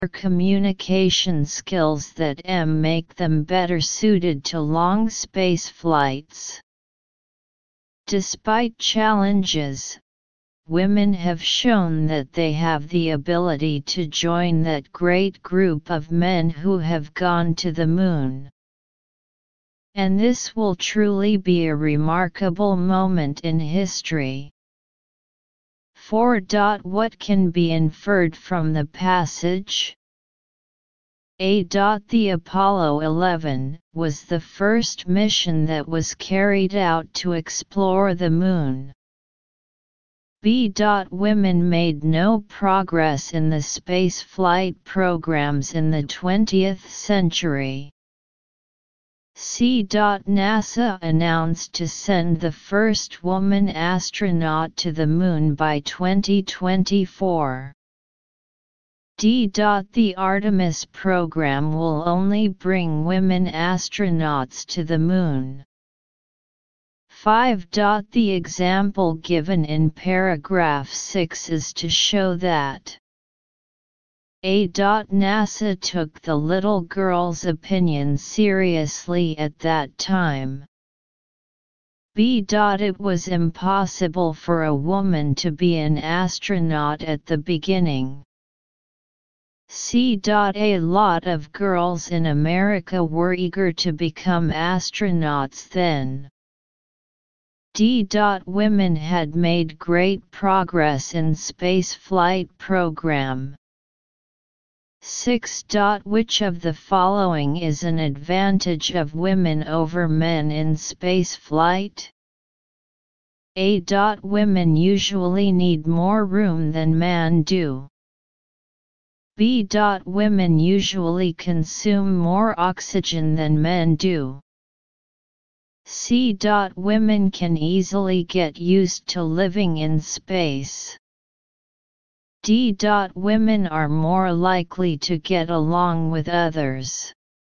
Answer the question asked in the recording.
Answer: 6. D.